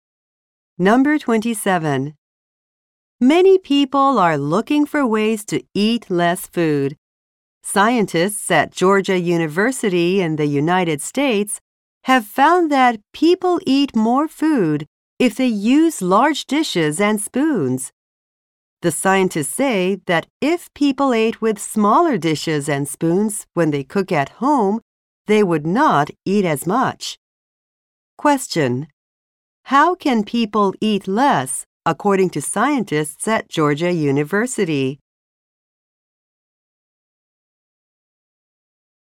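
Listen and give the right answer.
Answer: By using smaller dishes and spoons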